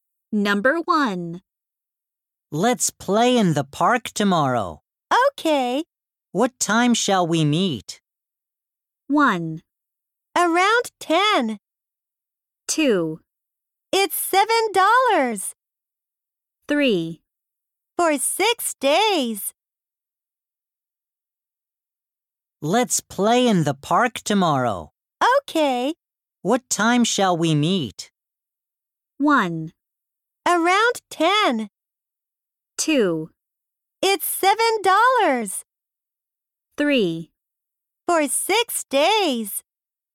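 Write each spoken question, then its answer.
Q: What time shall we meet?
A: 1: Around 10.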